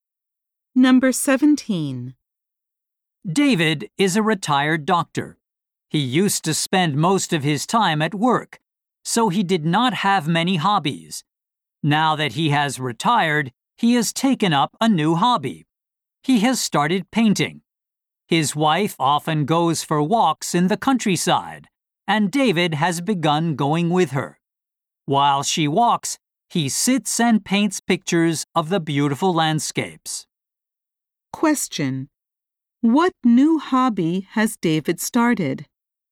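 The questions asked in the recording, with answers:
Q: What new hobby has David started?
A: Painting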